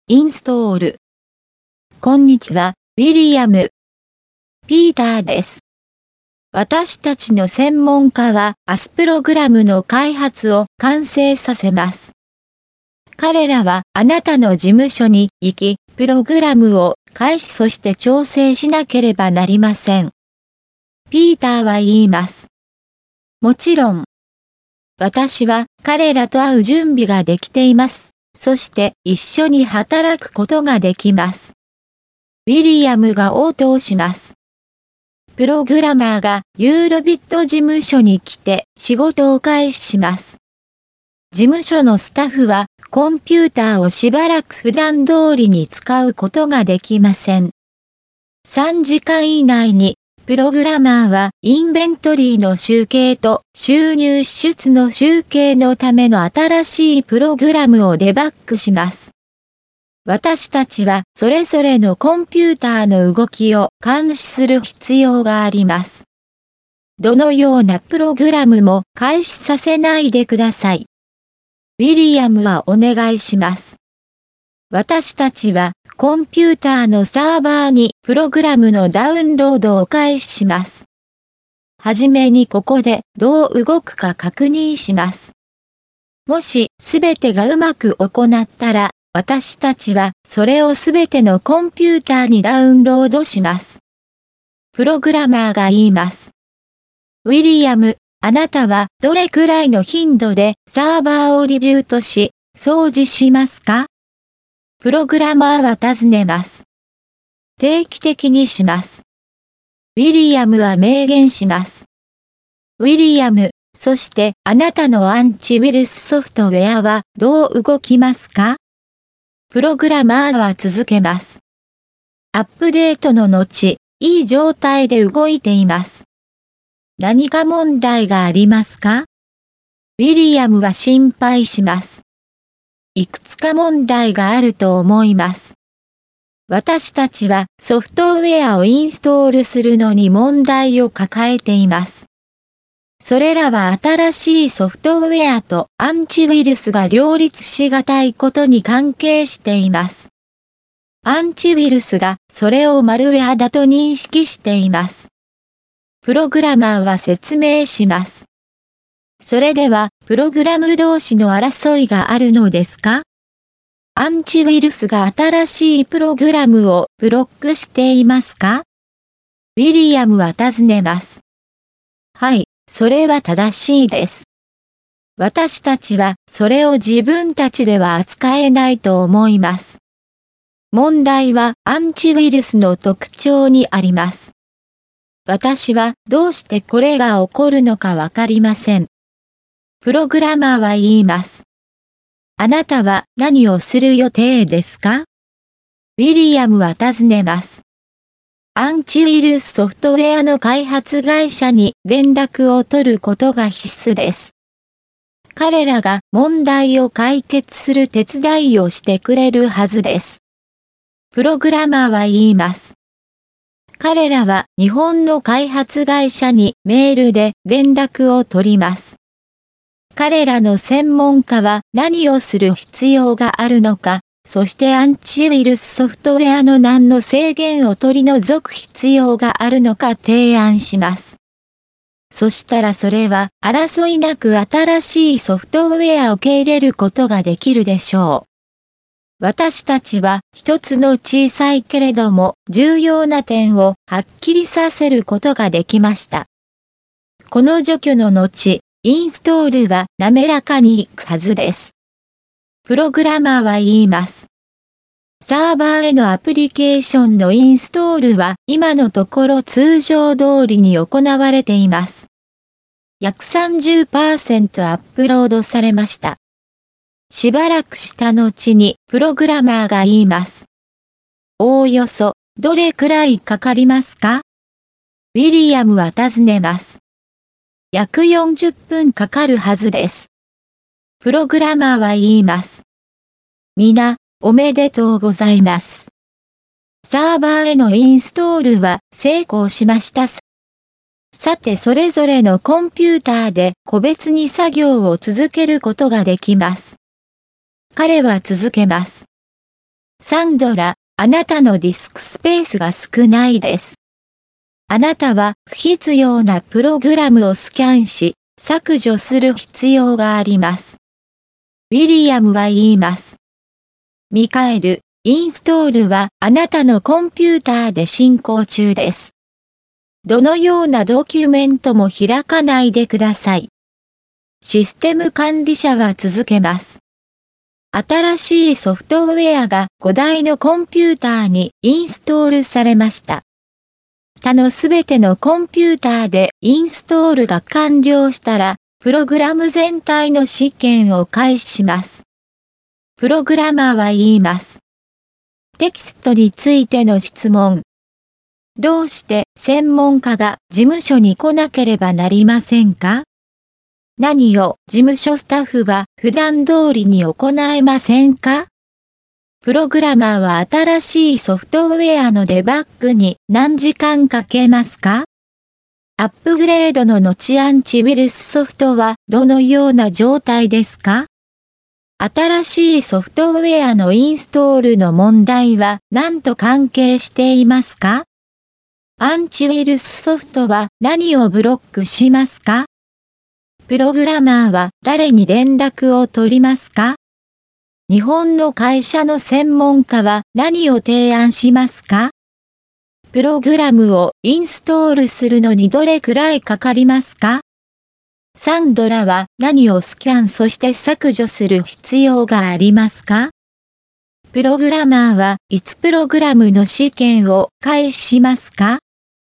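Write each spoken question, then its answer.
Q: どうして専門家が事務所に来なければなりませんか?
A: プログラムを開始そして調整するため

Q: 何を事務所スタッフは普段通りに行えませんか?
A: コンピューターを使うこと

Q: プログラマーは新しいソフトウェアのデバッグに何時間かけますか?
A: 3時間以内

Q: アップグレードの後アンチウイルスソフトはどのような状態ですか?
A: いい状態で動いている

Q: 新しいソフトウェアのインストールの問題は何と関係していますか?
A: 新しいソフトウェアとアンチウイルスが両立しがたいこと

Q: アンチウイルスソフトは何をブロックしますか?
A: 新しいプログラム

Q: プログラマーは誰に連絡を取りますか?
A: アンチウイルスソフトウェアの日本の開発会社

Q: 日本の会社の専門家は何を提案しますか?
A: 何をする必要があるか、アンチウイルスソフトウェアのどの制限を取り除く必要があるか

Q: プログラムをインストールするのにどれくらいかかりますか?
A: 約40分

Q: サンドラは何をスキャンそして削除する必要がありますか?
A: 不必要なプログラム

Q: プログラマーはいつプログラムの試験を開始しますか?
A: 他のすべてのコンピューターでインストールが完了したら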